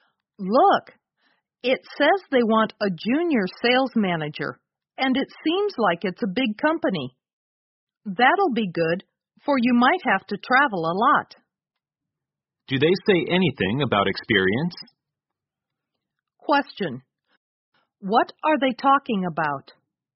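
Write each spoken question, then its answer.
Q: What are they talking about?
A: A job advertisement (junior sales manager position)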